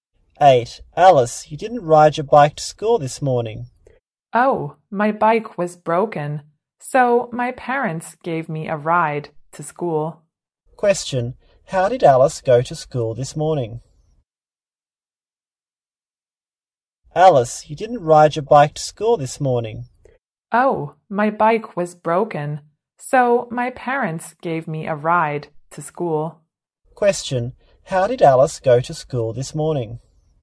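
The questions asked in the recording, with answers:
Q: How did Alice go to school this morning?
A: Her parents gave her a ride (by car).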